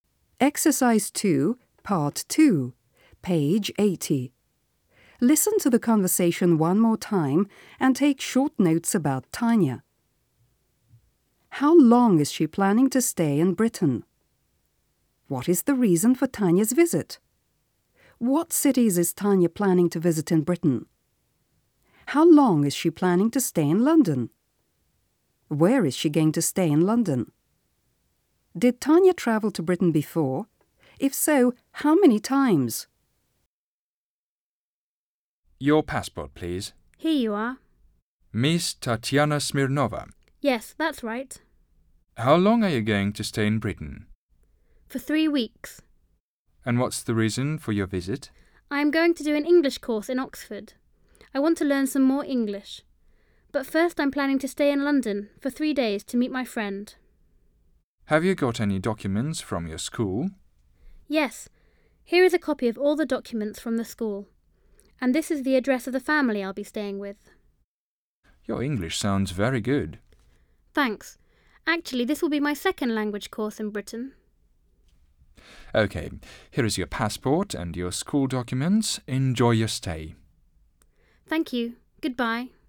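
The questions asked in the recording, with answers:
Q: How long is she planning to stay in Britain?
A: For 3 weeks

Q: What is the reason for Tanya's visit?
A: To do an English course in Oxford

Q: What cities is Tanya planning to visit in Britain?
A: London and Oxford

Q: How long is she planning to stay in London?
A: 3 days

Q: Did Tanya travel to Britain before?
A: Yes

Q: If so, how many times?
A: Once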